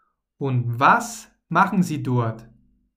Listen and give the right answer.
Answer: Sie arbeiten dort als Montagearbeiter.